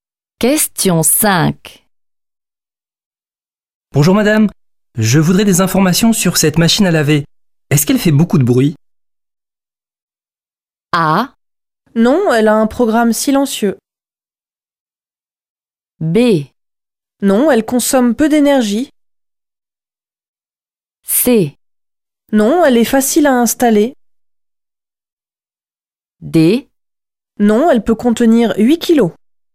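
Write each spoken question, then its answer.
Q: Est-ce qu'elle fait beaucoup de bruit?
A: A: Non, elle a un programme silencieux.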